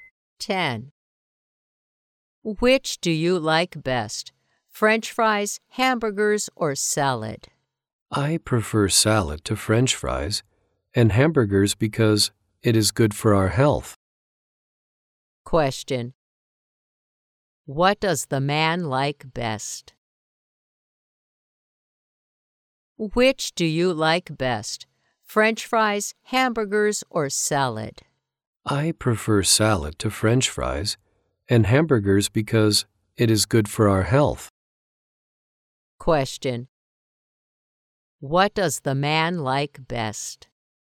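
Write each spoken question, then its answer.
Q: What does the man like best?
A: Salad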